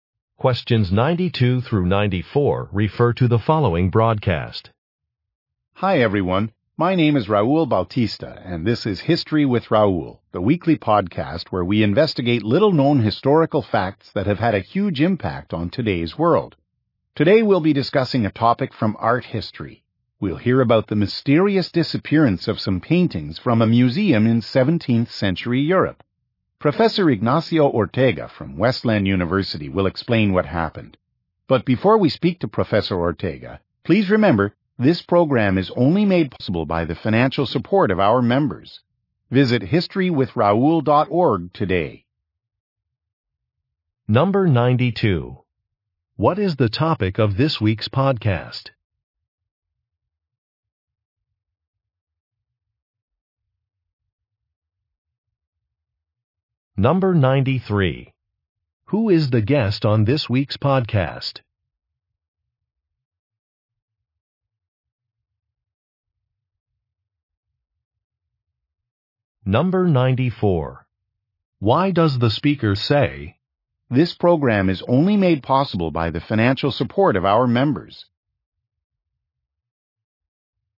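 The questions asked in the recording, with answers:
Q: What is the topic of this week's podcast?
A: The disappearance of paintings from a 17th century museum

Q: Who is the guest on this week's podcast?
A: Professor Ignacio Ortega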